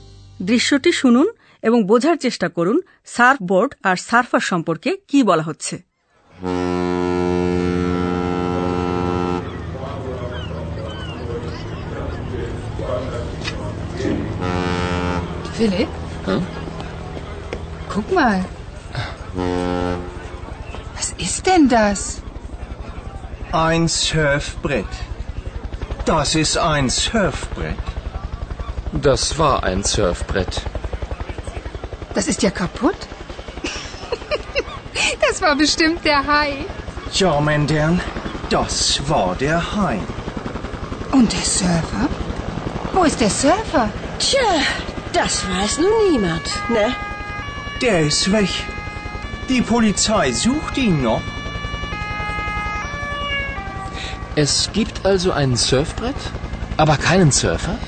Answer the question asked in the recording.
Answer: তিনি নিখোঁজ police তাকে এখনো খুঁজছে